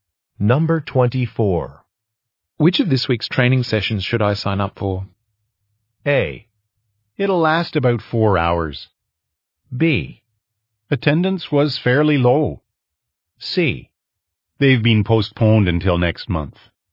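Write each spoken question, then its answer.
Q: Which of this week's training sessions should I sign up for?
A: C: They've been postponed until next month.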